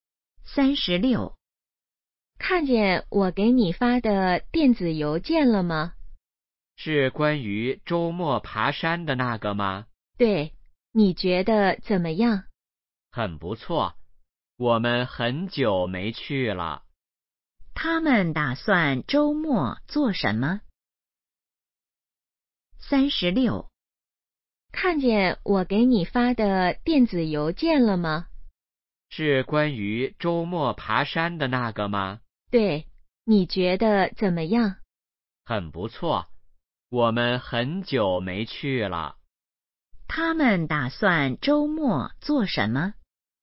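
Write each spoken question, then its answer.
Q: 他们打算周末做什么?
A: 爬山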